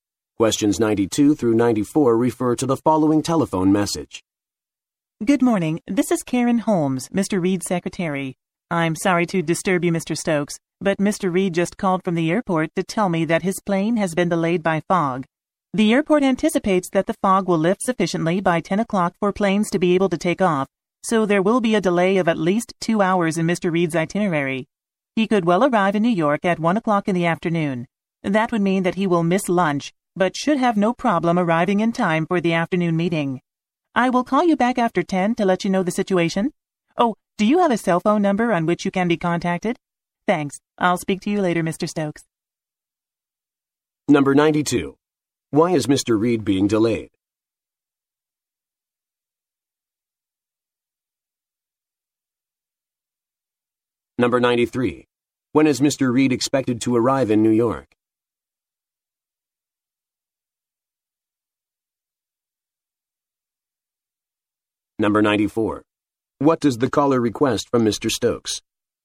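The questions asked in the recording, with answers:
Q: Why is Mr. Reed being delayed?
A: His plane is delayed by fog

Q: When is Mr. Reed expected to arrive in New York?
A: At 1 o'clock in the afternoon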